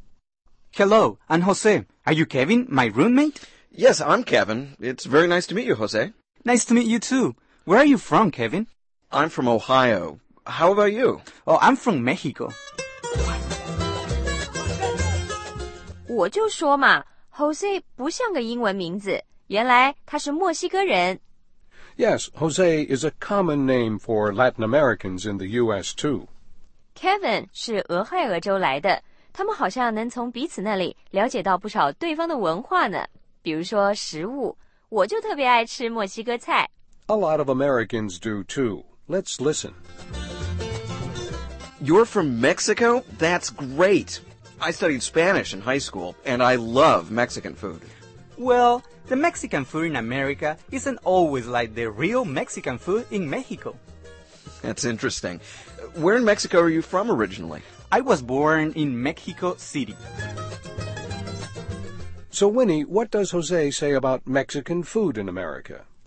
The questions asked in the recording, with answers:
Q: So Winnie, what does Jose say about Mexican food in America?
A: 他说美国的墨西哥菜不是真正的墨西哥菜